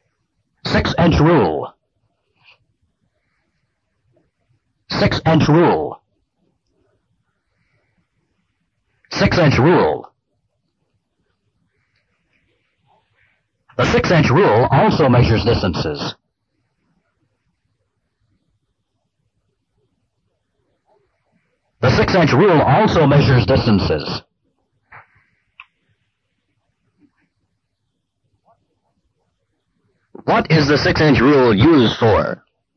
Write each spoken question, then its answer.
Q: What is the 6-inch rule used for?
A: To measure distances.